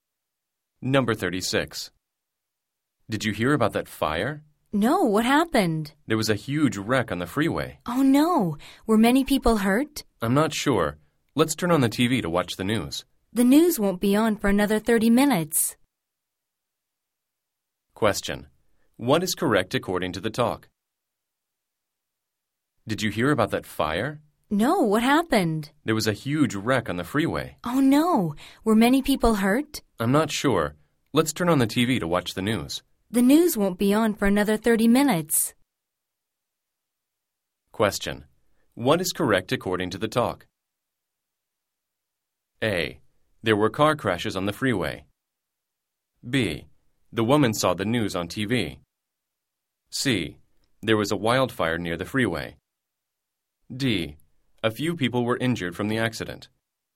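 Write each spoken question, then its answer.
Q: What is correct according to the talk?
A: A: There were car crashes on the freeway.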